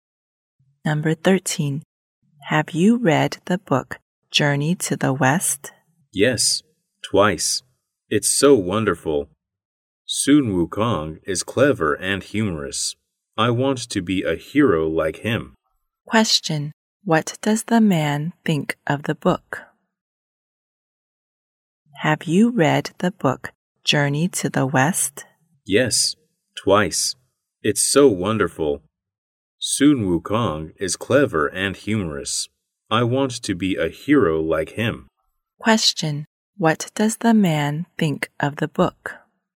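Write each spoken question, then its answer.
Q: What does the man think of the book?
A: It's wonderful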